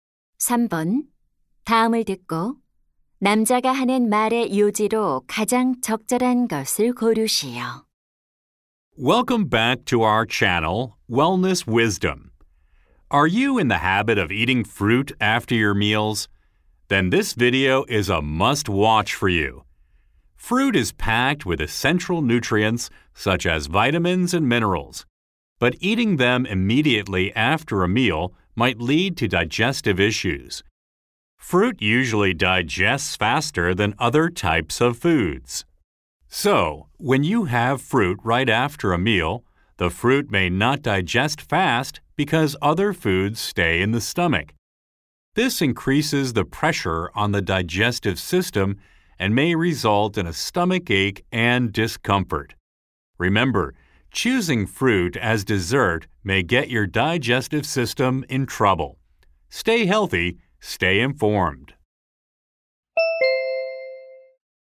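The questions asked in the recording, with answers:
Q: 다음을 듣고 남자가 하는 말의 요지로 가장 적절한 것을 고르시오.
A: 식사 직후 과일을 먹으면 소화 문제를 일으킬 수 있다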